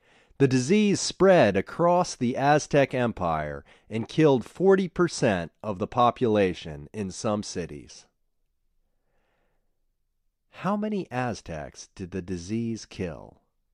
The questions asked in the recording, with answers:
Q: How many Aztecs did the disease kill?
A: The disease killed 40% of the population in some cities.